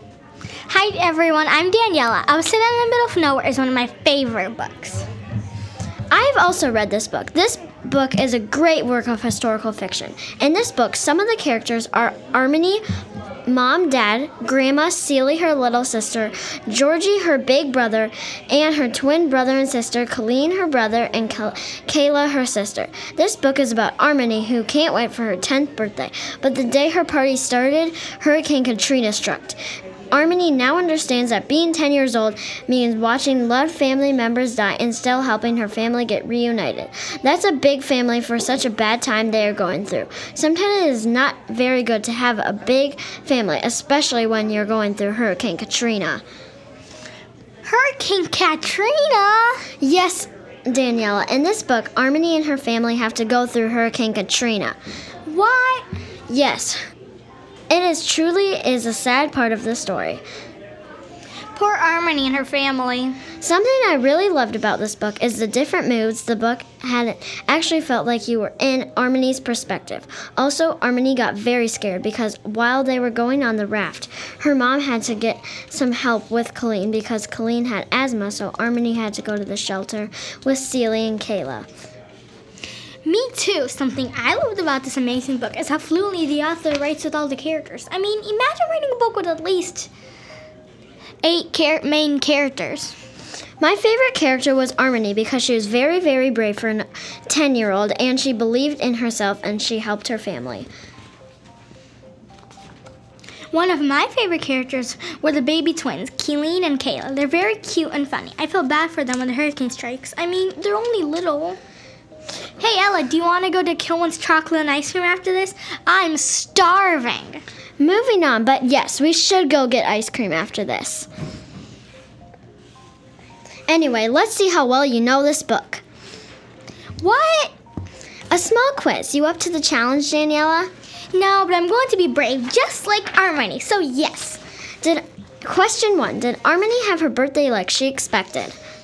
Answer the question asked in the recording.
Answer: No, she did not. Because the Hurricane Katrina strikes the day of her birthday party, which she did so not expect.